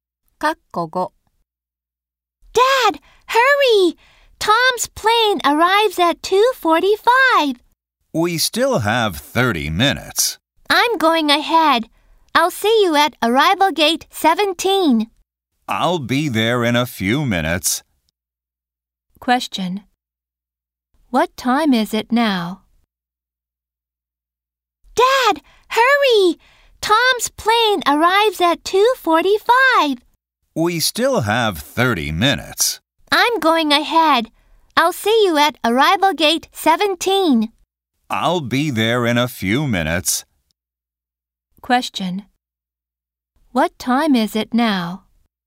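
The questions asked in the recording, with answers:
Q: What time is it now?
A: 2:15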